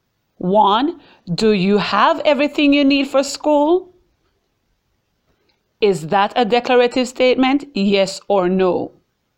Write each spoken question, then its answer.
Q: Is that a declarative statement?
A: Absolutely not. That is an example of an interrogative sentence.